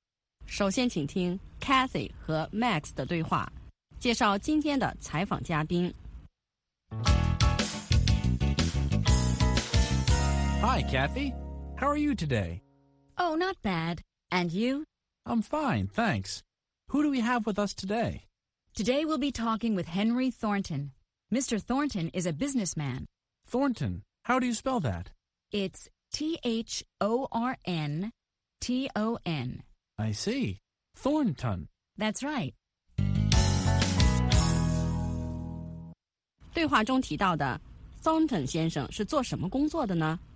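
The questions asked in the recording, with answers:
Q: 对话中提到的 Thornton 先生是做什么工作的呢?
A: 商人(businessman)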